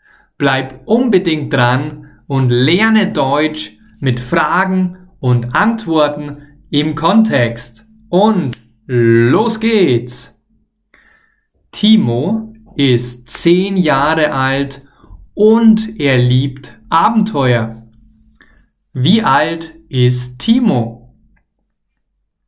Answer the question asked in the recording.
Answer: 10. Timo ist 10 Jahre alt.